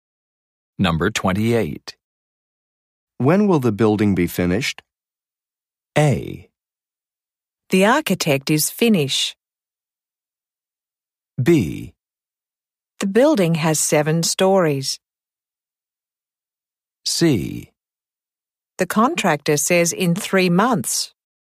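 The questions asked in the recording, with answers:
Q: When will the building be finished?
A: C: The contractor says in 3 months.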